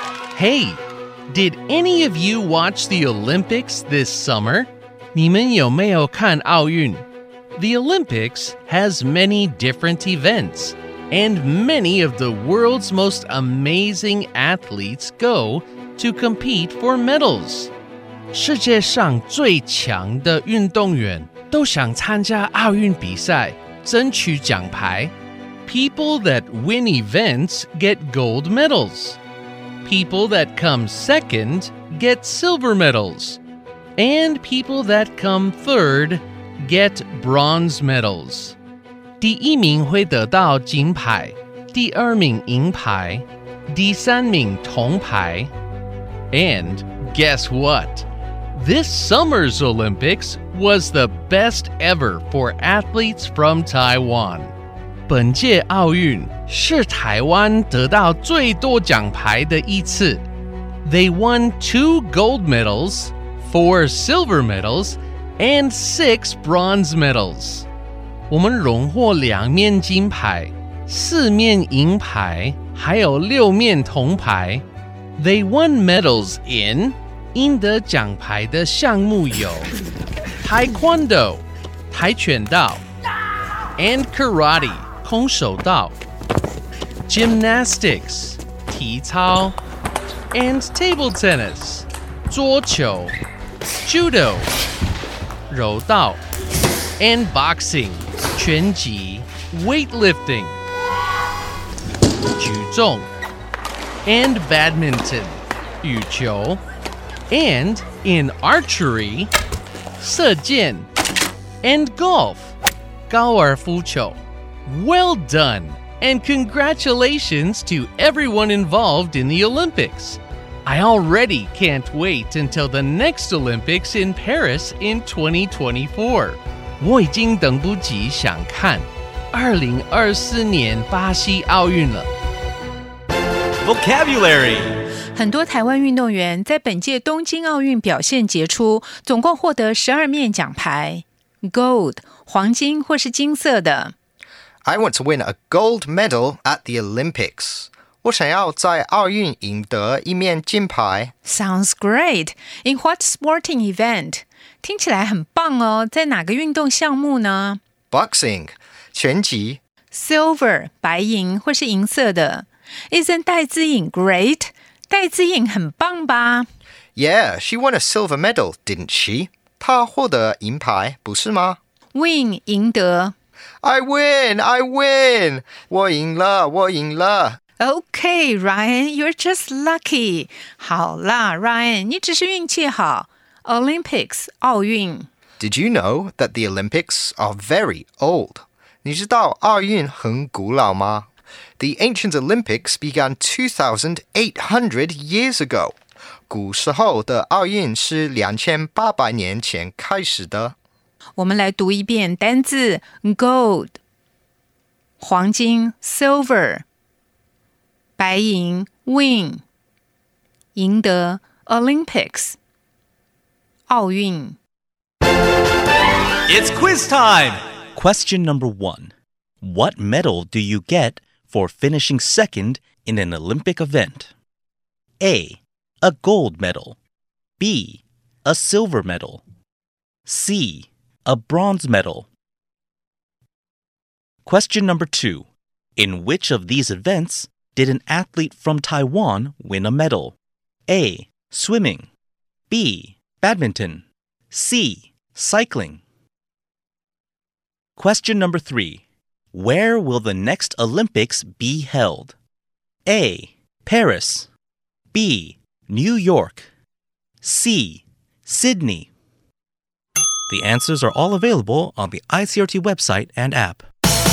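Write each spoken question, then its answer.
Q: What medal do you get for finishing second in an Olympic event?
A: B: A silver medal

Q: In which of these events did an athlete from Taiwan win a medal?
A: B: Badminton

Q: Where will the next Olympics be held?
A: A: Paris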